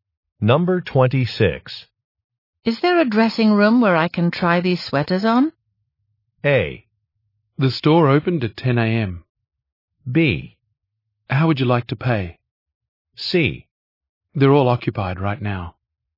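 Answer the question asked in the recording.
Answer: C: They're all occupied right now.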